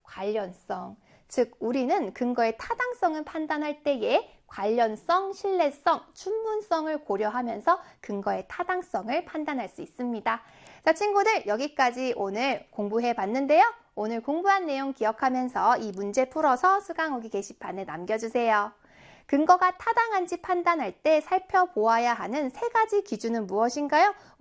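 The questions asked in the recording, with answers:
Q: 근거가 타당한지 판단할 때 살펴보아야 하는 세 가지 기준은 무엇인가요?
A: 관련성, 신뢰성, 충분성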